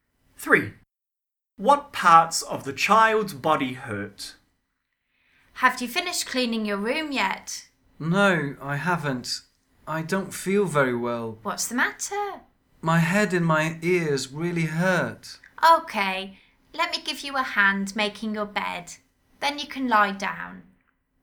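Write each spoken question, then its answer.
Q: What parts of the child's body hurt?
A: Head and ears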